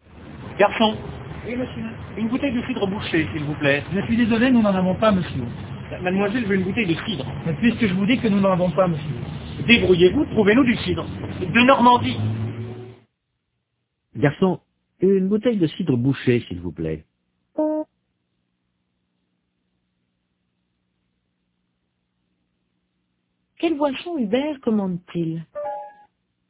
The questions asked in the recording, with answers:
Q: Quelle boisson Hubert commande-t-il?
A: Du cidre bouché.